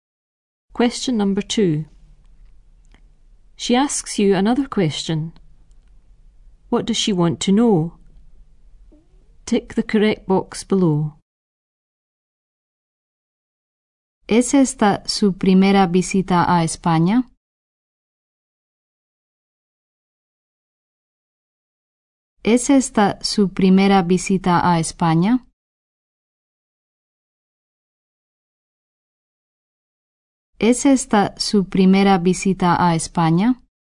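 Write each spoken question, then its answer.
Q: What does she want to know?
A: Whether this is your first visit to Spain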